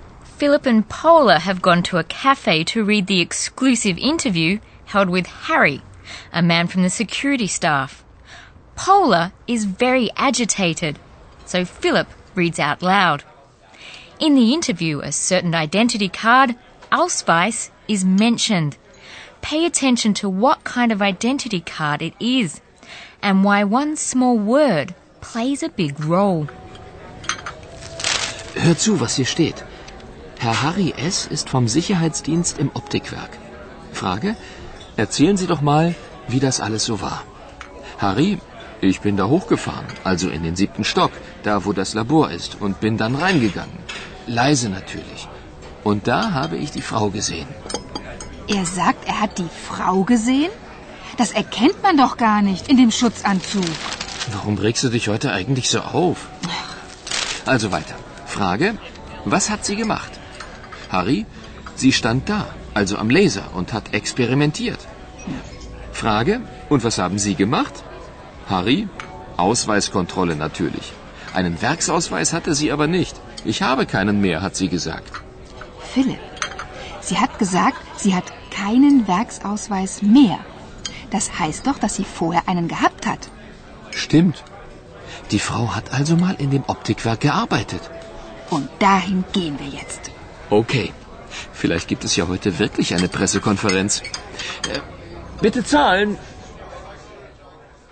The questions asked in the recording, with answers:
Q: Pay attention to what kind of identity card it is and why one small word plays a big role.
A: It means that the woman must once have had a factory identity card, and thus that she used to work in the optics factory.